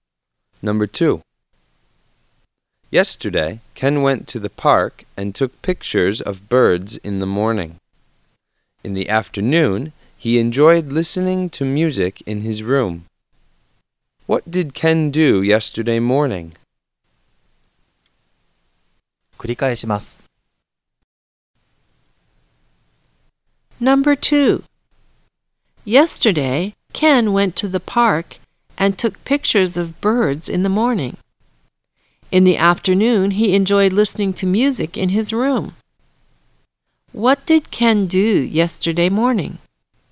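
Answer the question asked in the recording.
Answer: He took pictures of birds in the park.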